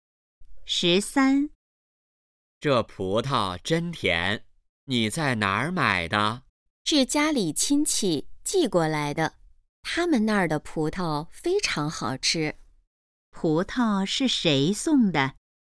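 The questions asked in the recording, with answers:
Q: 葡萄是谁送的?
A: 家里亲戚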